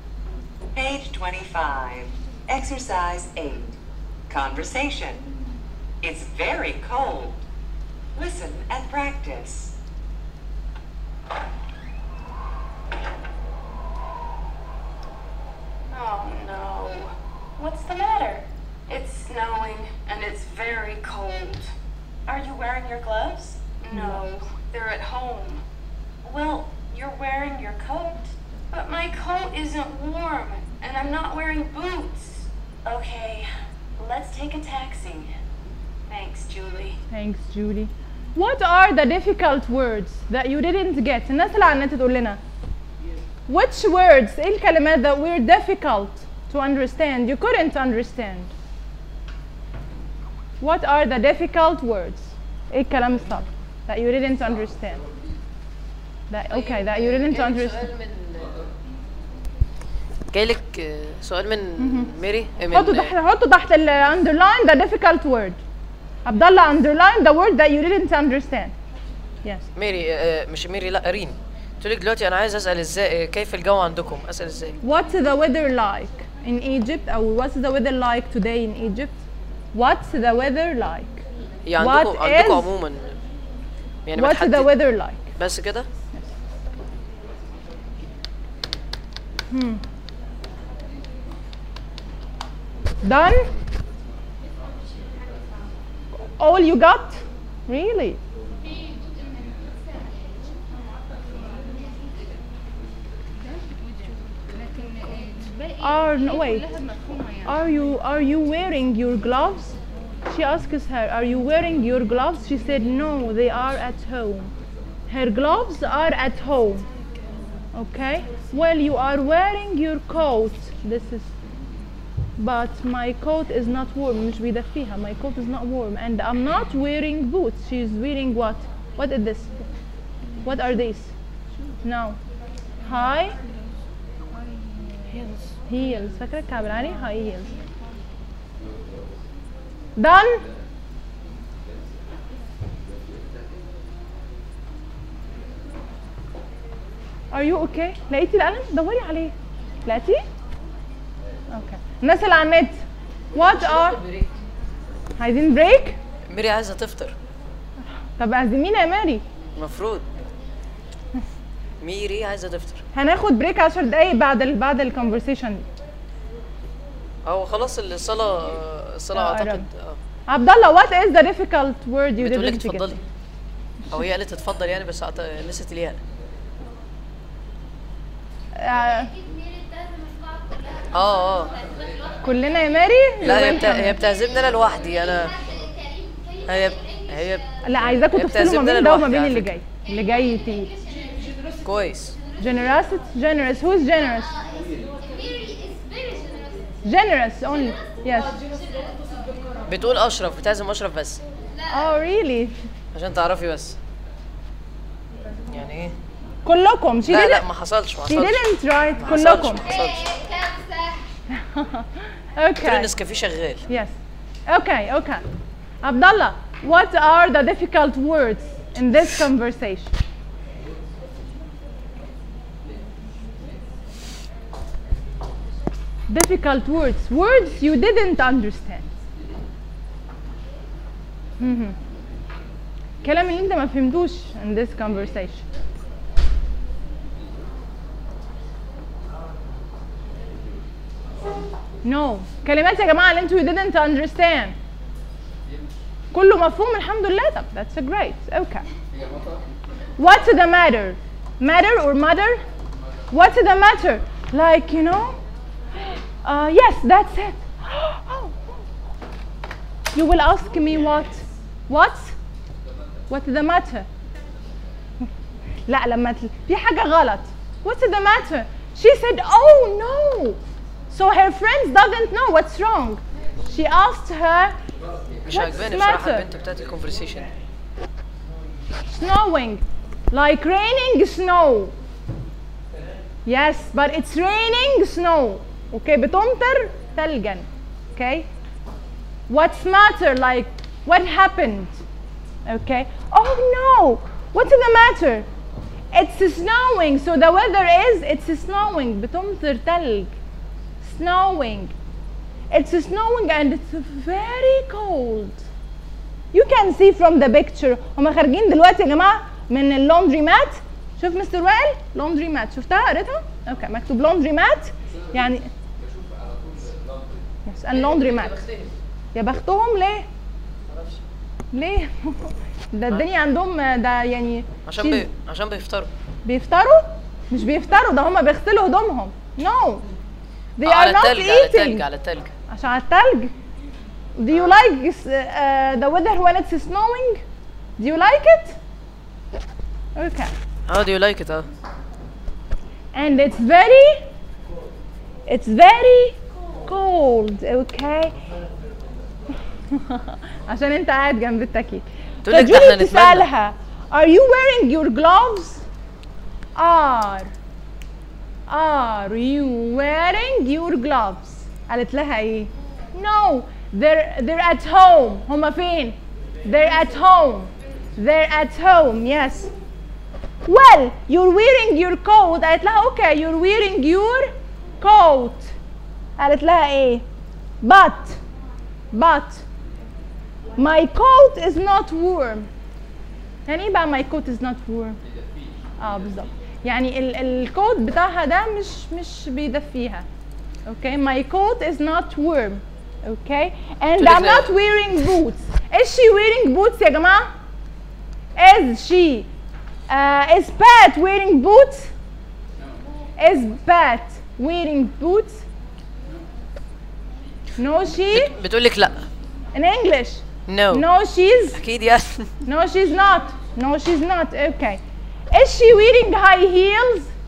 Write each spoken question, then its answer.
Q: Is she wearing high heels?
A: Yes, she is.